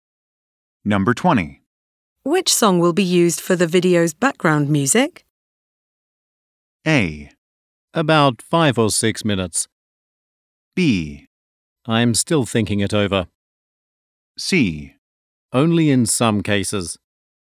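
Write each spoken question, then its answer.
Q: Which song will be used for the video's background music?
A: B: I'm still thinking it over.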